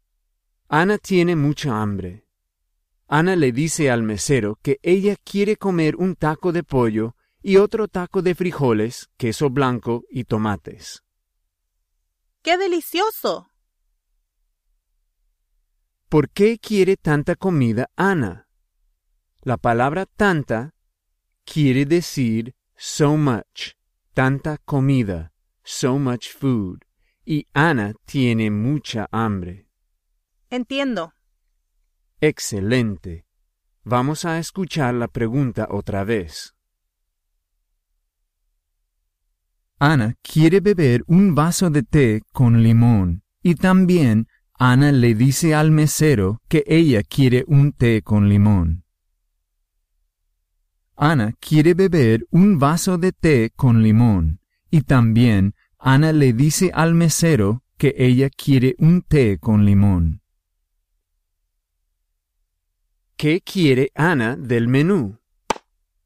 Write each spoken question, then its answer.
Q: ¿Qué quiere Anna del menú?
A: Anna quiere comer un taco de pollo y otro taco de frijoles, queso blanco y tomates.